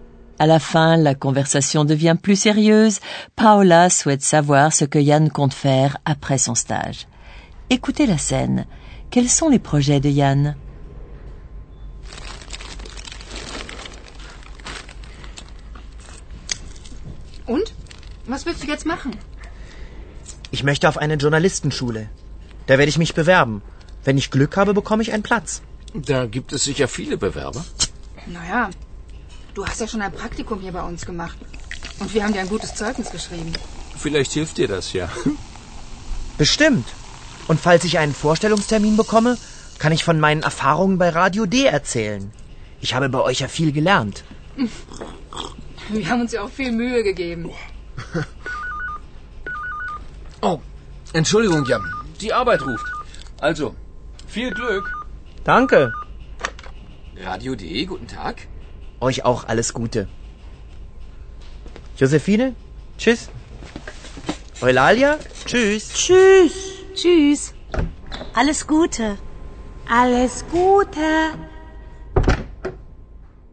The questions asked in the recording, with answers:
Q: Quels sont les projets de Yann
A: Yann veut aller dans une école de journalisme.